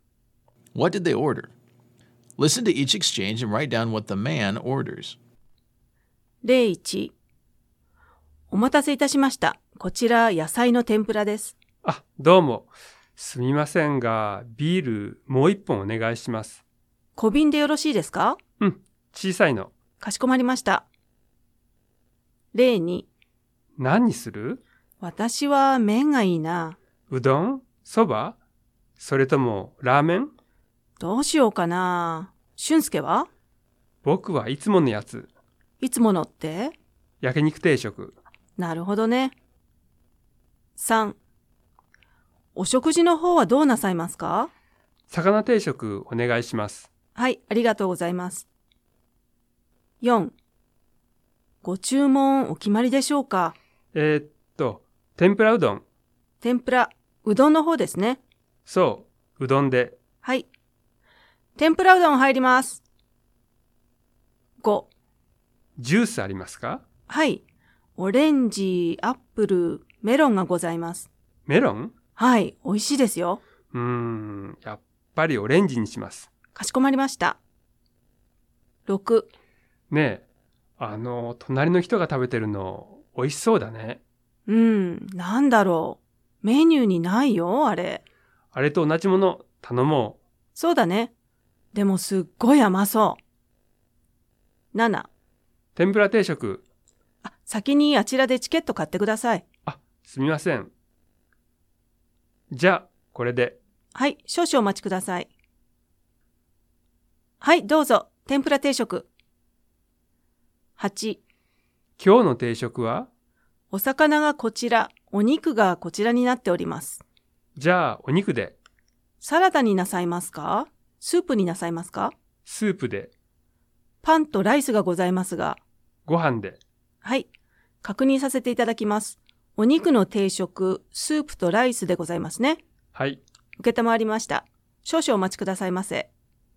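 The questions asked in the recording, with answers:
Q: What did they order?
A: Another small bottle of beer

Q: What did they order?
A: Grilled meat set meal (yakiniku teishoku)

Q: What did they order?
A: Fish set meal

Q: What did they order?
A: Tempura udon

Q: What did they order?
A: Orange juice

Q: What did they order?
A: Tempura set meal

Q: What did they order?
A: Meat set meal with soup and rice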